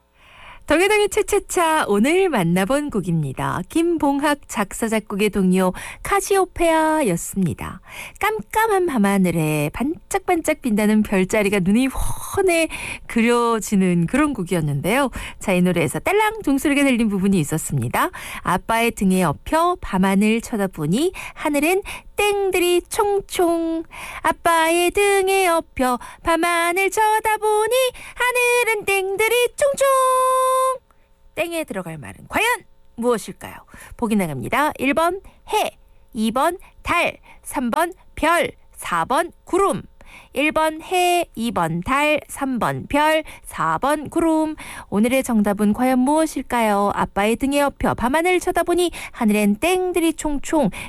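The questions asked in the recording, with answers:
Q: 땡에 들어갈 말은 과연 무엇일까요?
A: 3번: 별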